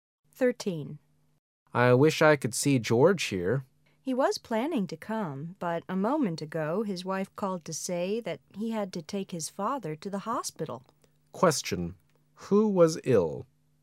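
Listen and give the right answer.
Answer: George's father

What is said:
[解析] M: I wish I could see George here. W: He was planning to come, but a moment ago, his wife called to say that he had to take his father to the hospital. Q: Who was ill?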